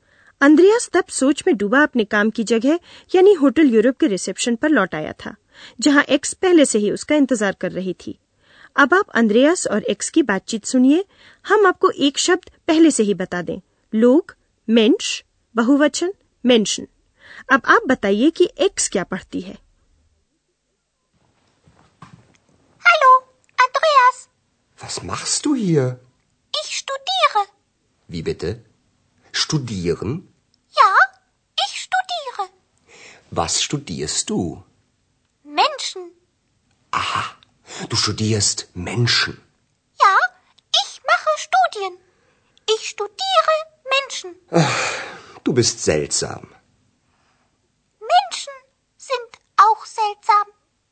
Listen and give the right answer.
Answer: तो x लोगों का अध्ययन करती है